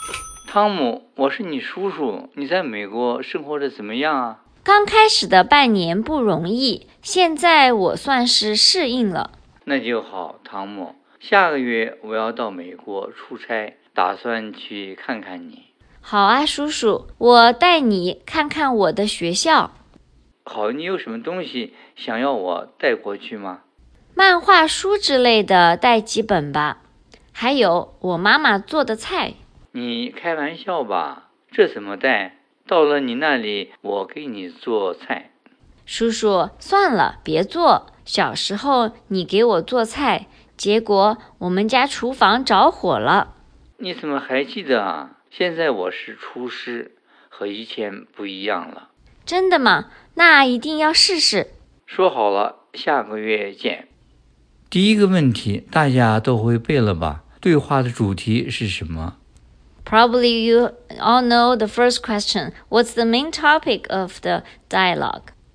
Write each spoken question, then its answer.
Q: 对话的主题是什么?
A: 汤姆的叔叔要去看汤姆,他们在电话里计划呢。